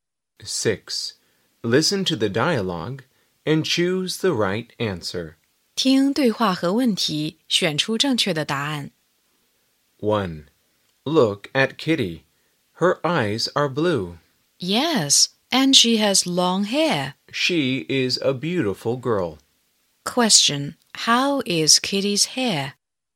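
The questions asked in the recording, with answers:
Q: How is Kitty's hair?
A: long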